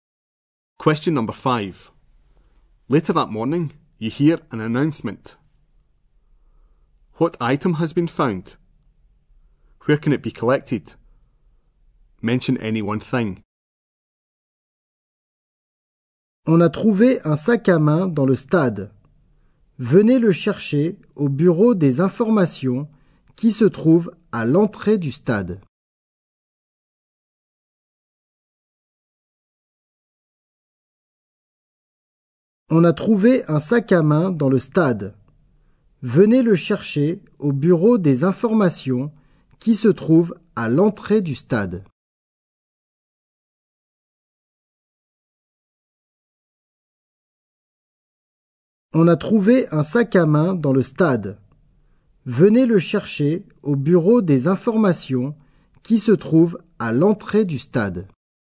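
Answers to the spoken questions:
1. A handbag
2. At the information office at the stadium entrance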